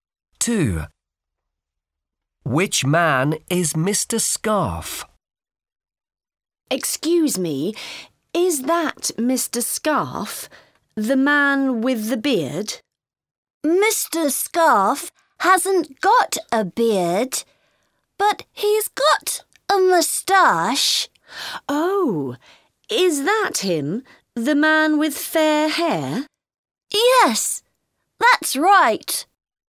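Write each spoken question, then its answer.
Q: Which man is Mr. Scarf?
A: The man with fair hair and a moustache, no beard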